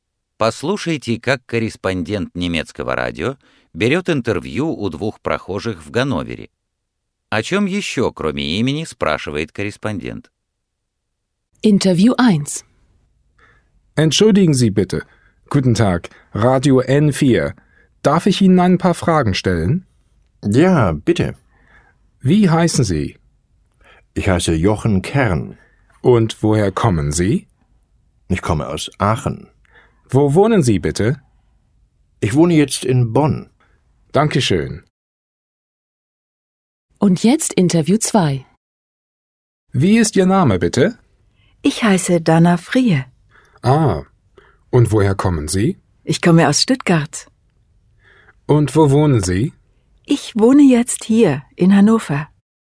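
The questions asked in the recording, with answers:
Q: О чем еще, кроме имени, спрашивает корреспондент?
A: Откуда человек родом и где он живёт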